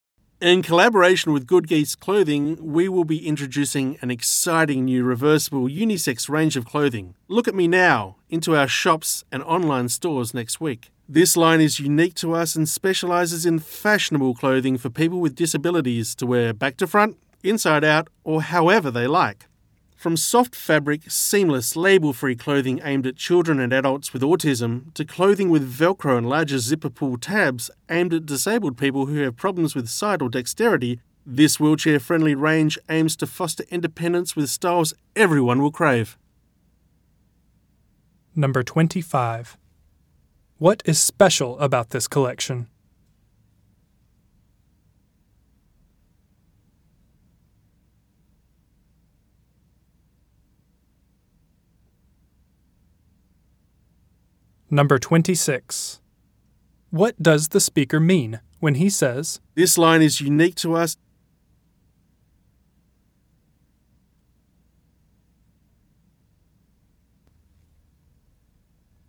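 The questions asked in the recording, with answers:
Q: What is special about this collection?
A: It is reversible, fashionable clothing designed for people with disabilities

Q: What does the speaker mean when he says,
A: Only their shops sell this line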